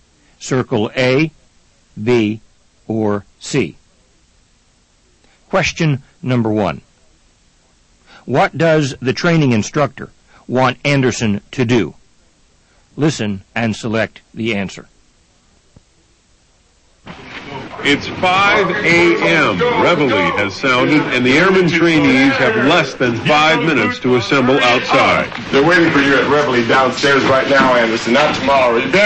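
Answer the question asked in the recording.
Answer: Go downstairs to Reveille right now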